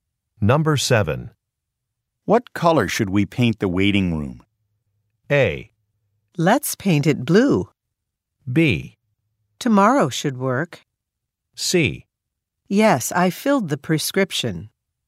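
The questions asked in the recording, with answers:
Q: What color should we paint the waiting room?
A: A: Let's paint it blue.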